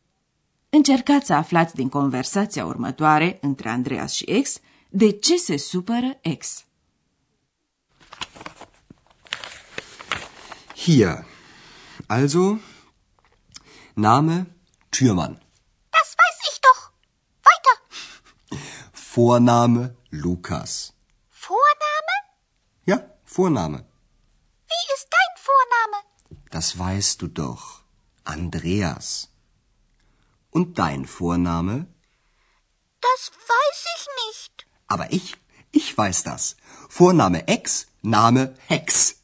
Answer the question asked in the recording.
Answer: Ex a supărat pentru că Andreas a inventat pentru ea un nume de familie și anume Hex, ceea ce înseamnă vrăjitoare.